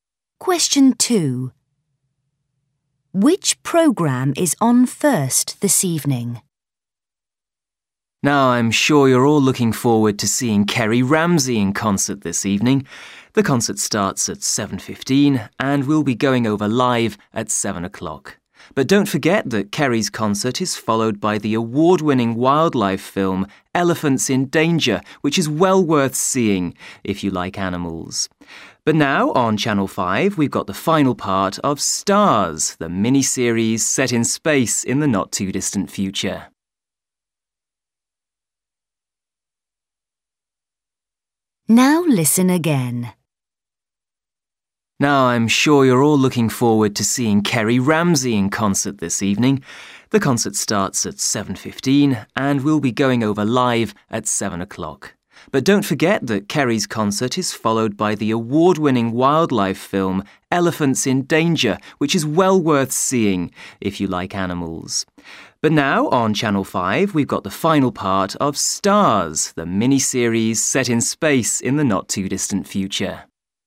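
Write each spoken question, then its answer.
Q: Which programme is on first this evening?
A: Stars, the space mini-series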